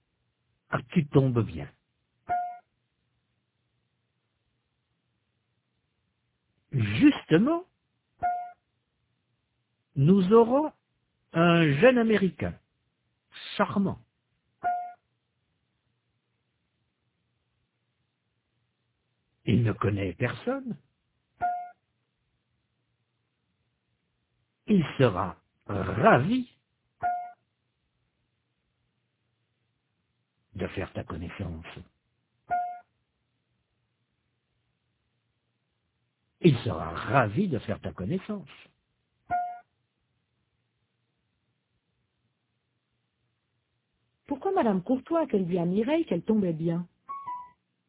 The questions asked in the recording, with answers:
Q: Pourquoi Madame Courtois a-t-elle dit à Mireille qu'elle tombait bien?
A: Parce que justement, ils auront un jeune Américain charmant.